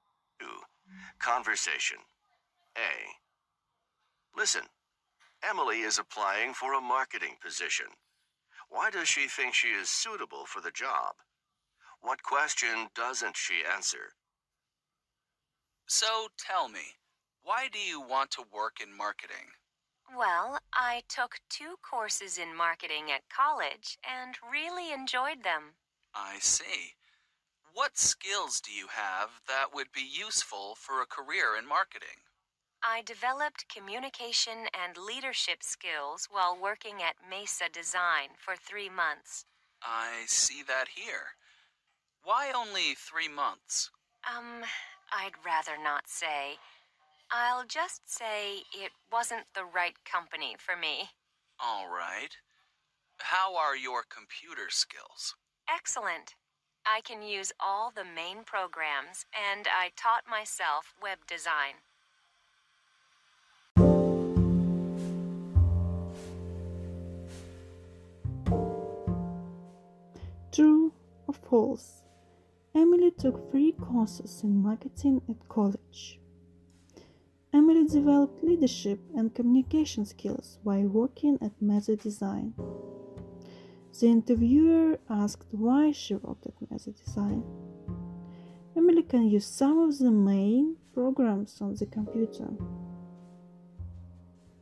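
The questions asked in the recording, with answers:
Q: Why does she think she is suitable for the job?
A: She took two marketing courses, has communication and leadership skills, and has excellent computer skills

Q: What question doesn't she answer?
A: Why she worked at Mesa Design for only 3 months

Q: Emily took 3 courses in marketing at college.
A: False

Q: Emily developed leadership and communication skills while working at Mesa Design.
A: True

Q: The interviewer asked why she worked at Mesa Design.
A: False

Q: Emily can use some of the main programs on the computer.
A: False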